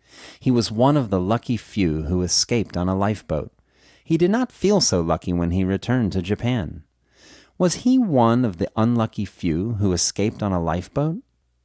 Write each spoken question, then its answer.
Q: Was he one of the unlucky few who escaped on a lifeboat?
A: No, he wasn't one of the unlucky few who escaped on a lifeboat.